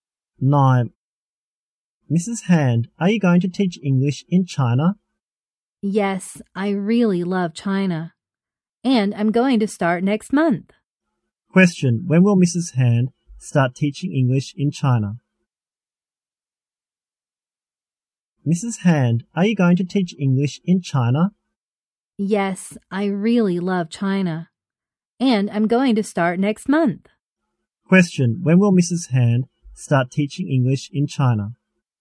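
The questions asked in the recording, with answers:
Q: Question. When will Mrs. Hand start teaching English in China?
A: Next month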